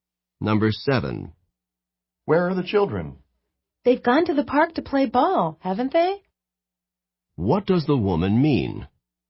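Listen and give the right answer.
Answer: She thinks the children went to the park to play ball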